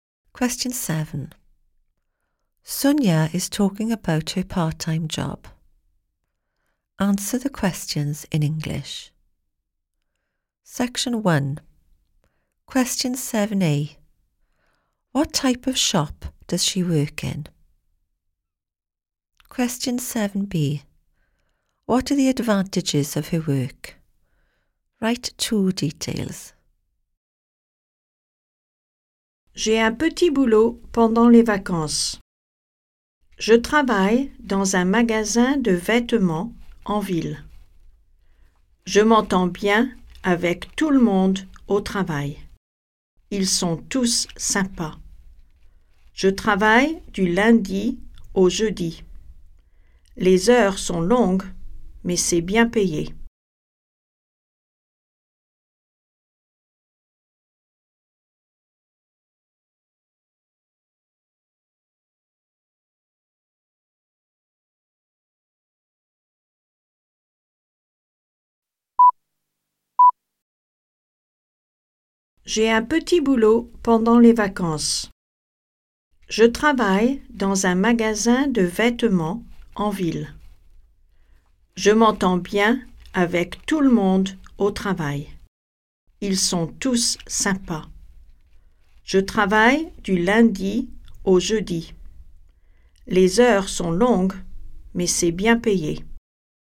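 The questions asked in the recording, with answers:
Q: What type of shop does she work in?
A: A clothes shop

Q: What are the advantages of her work?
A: She gets on with everyone / they are nice; it is well paid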